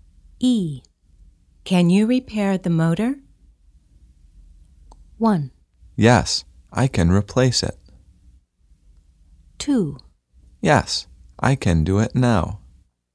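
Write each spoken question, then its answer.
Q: Can you repair the motor?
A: 2: Yes, I can do it now.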